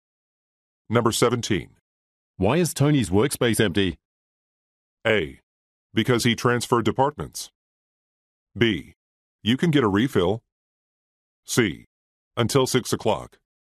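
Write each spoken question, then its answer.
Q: Why is Tony's workspace empty?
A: A: Because he transferred departments.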